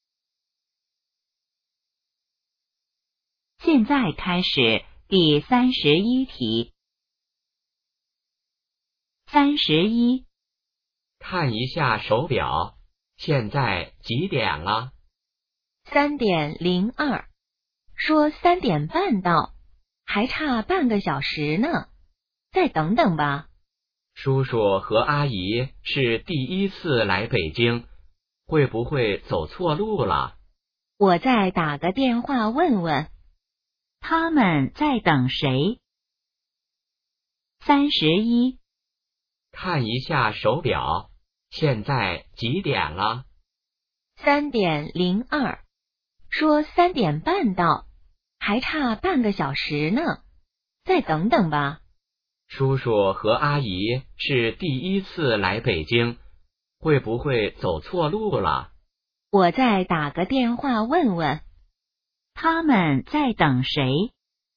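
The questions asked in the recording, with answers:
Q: 他们在等谁?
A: 叔叔和阿姨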